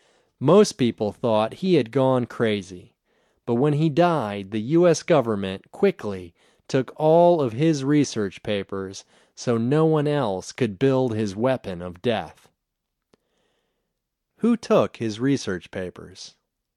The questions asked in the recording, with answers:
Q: Who took his research papers?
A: The U.S. government took his research papers.